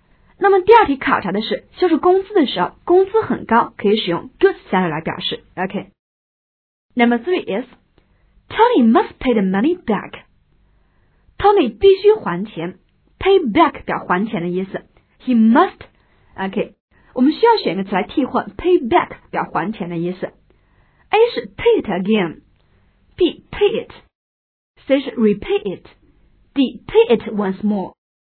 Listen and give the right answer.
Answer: OK, 答案应该是 C. Tony must pay the money back.